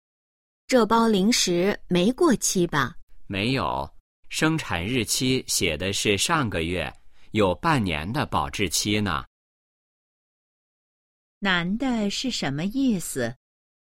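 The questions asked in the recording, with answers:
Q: 男的是什么意思?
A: 零食没过期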